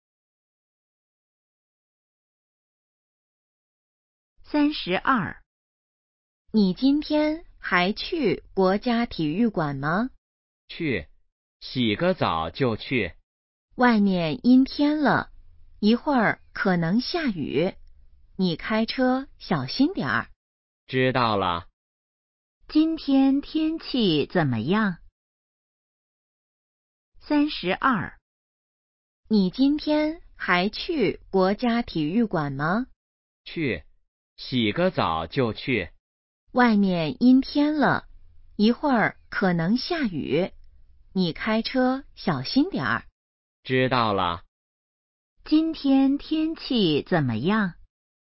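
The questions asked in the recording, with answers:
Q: 今天天气怎么样?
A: 阴天,可能下雨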